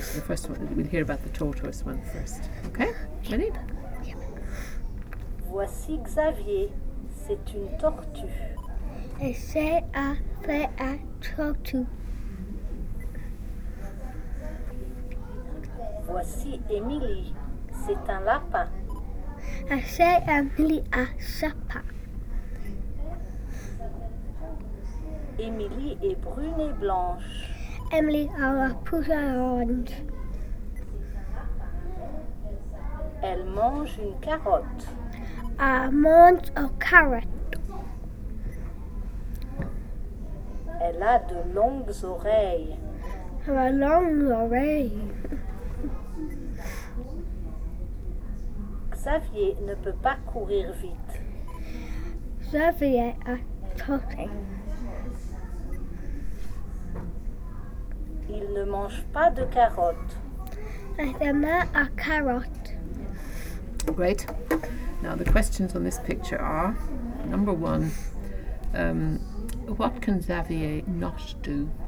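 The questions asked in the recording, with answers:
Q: what can Xavier not do?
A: He can't run fast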